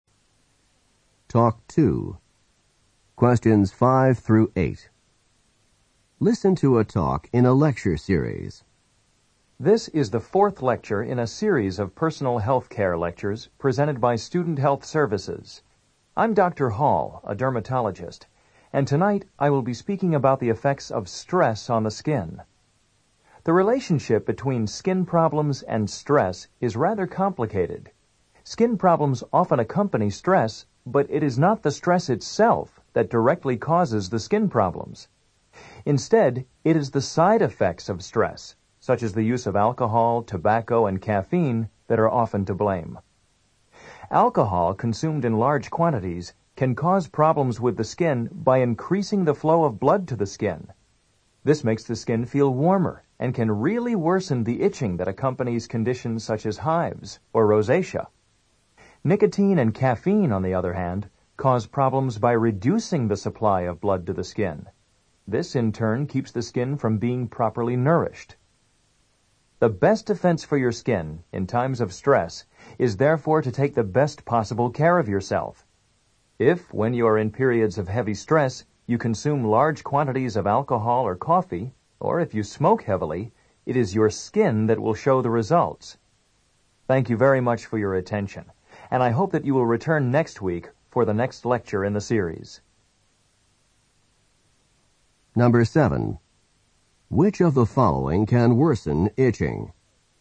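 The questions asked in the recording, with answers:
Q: Which of the following can worsen itching?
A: Alcohol consumed in large quantities (it increases blood flow to the skin)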